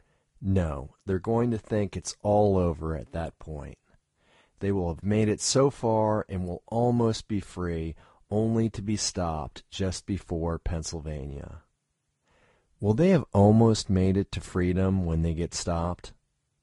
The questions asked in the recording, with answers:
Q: Will they have almost made it to freedom when they get stopped?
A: Yes, they will have almost made it to freedom when they get stopped.